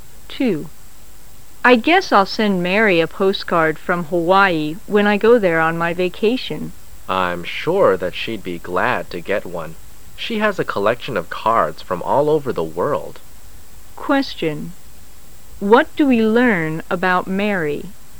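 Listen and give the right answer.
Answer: She collects postcards from all over the world

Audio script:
[解析] W: I guess I'll send Mary a postcard from Hawaii when I go there on my vacation. M: I'm sure that she'd be glad to get one. She has a collection of cards from all over the world. Q: What do we learn about Mary?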